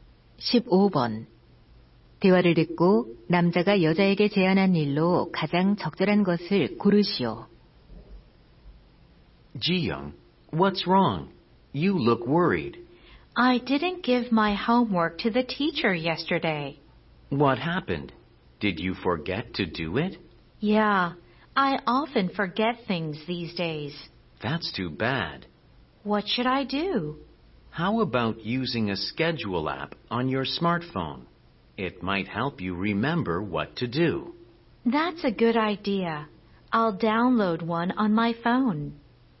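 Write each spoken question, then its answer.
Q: 대화를 듣고 남자가 여자에게 제안한 일로 가장 적절한 것을 고르시오.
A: 스마트폰 일정 관리 앱 사용하기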